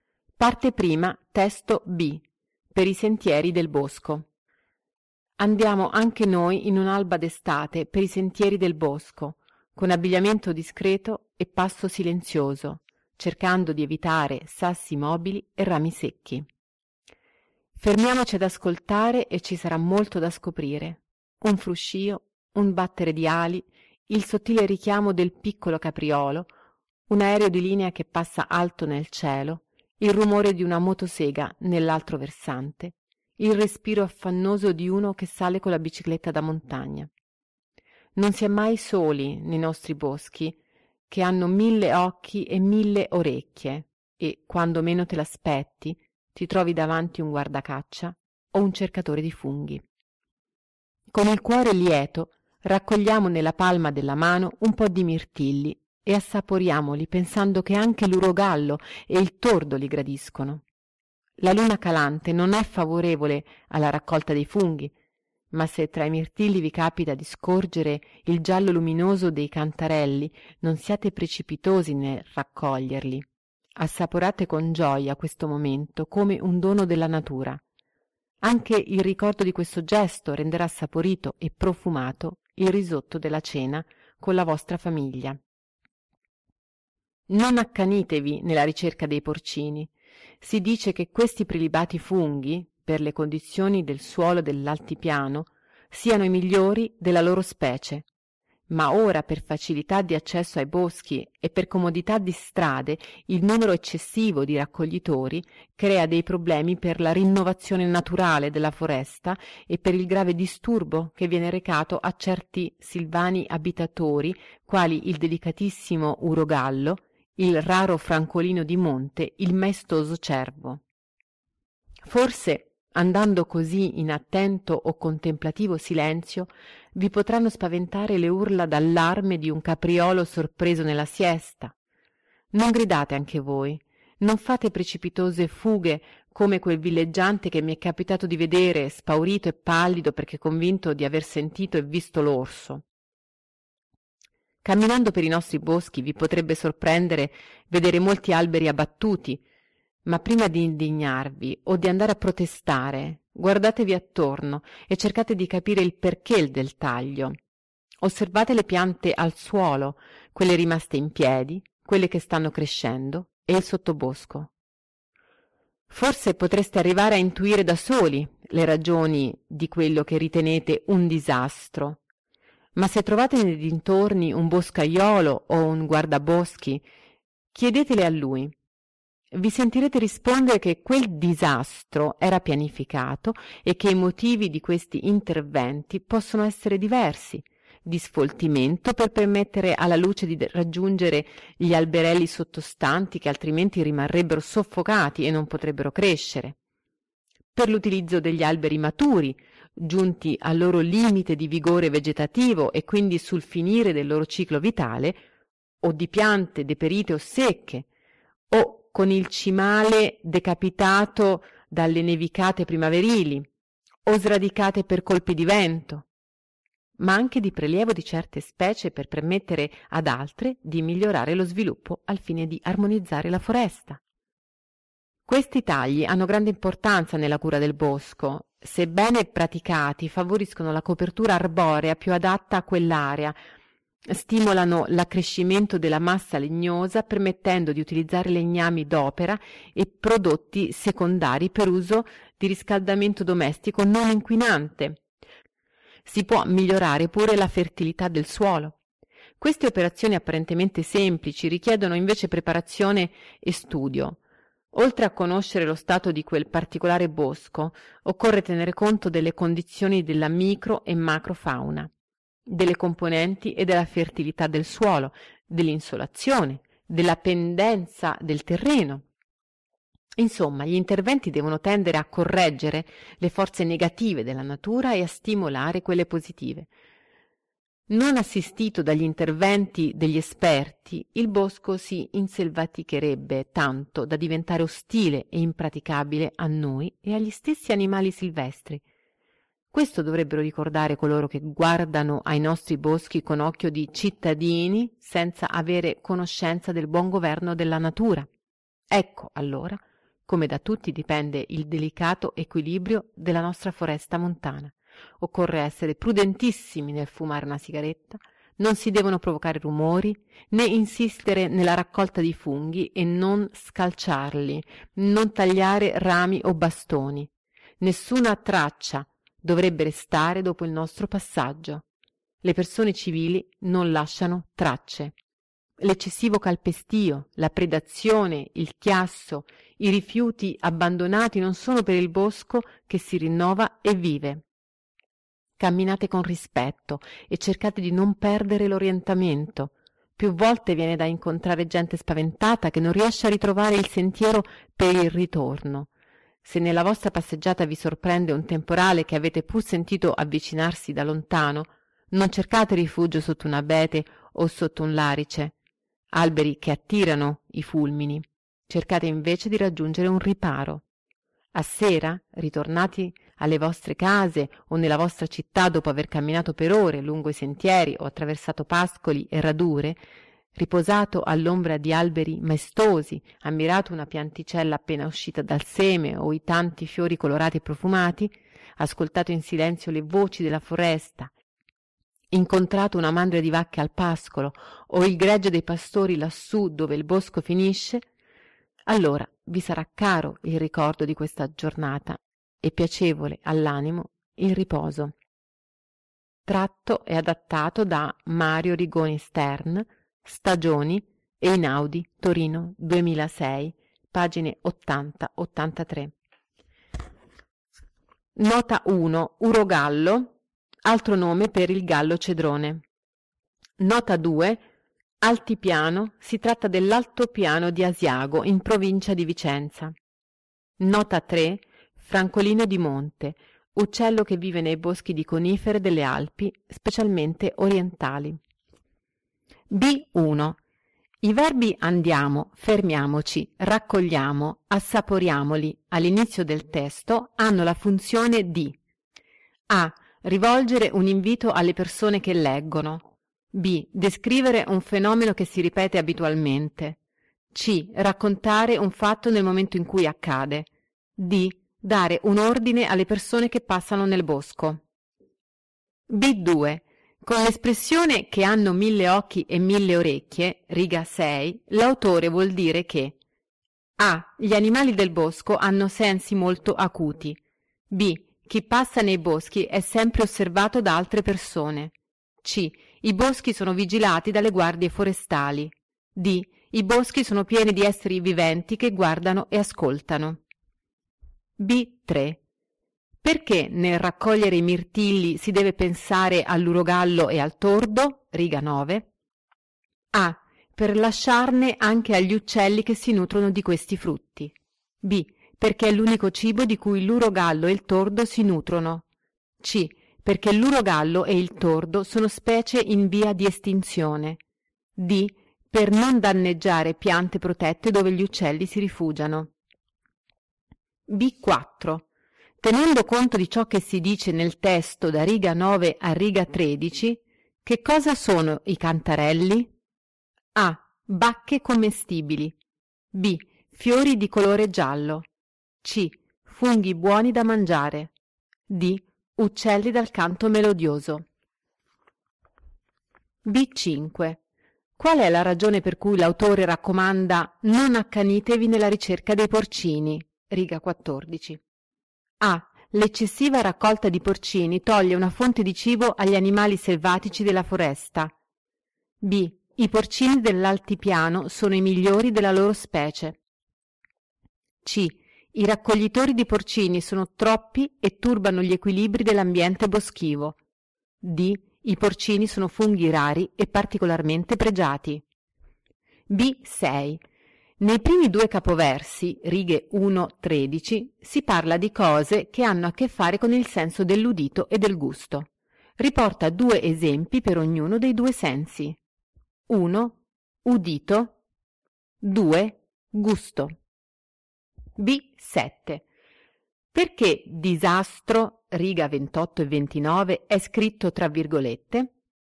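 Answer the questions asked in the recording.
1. A: Rivolgere un invito alle persone che leggono.
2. D: I boschi sono pieni di esseri viventi che guardano e ascoltano.
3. A: Per lasciarne anche agli uccelli che si nutrono di questi frutti.
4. C: Funghi buoni da mangiare.
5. C: I raccoglitori di porcini sono troppi e turbano gli equilibri dell'ambiente boschivo.
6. Udito: fruscio, battere di ali; gusto: mirtilli, risotto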